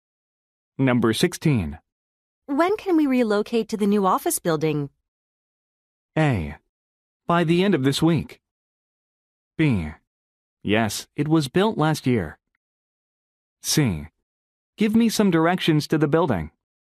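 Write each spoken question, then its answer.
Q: When can we relocate to the new office building?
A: A: By the end of this week.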